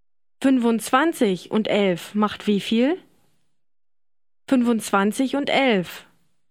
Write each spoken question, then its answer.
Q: 25 und 11 macht wie viel?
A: 36.